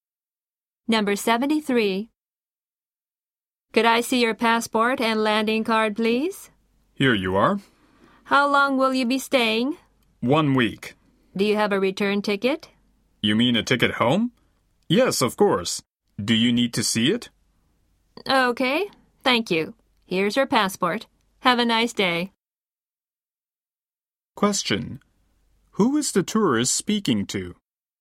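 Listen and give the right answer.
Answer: An immigration officer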